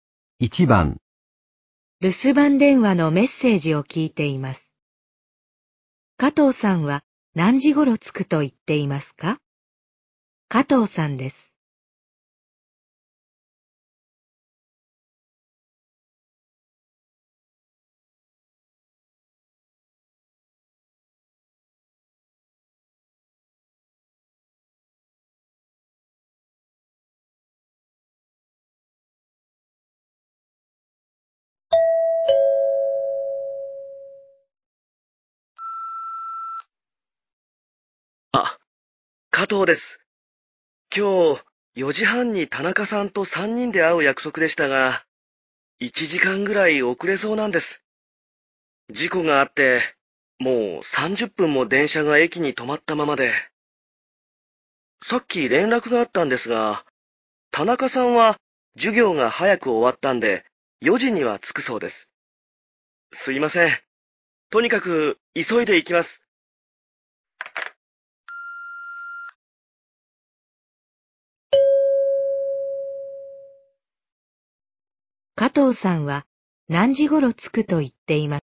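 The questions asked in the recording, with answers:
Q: 加藤さんは何時ごろ着くと言っていますか?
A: 5時半ごろ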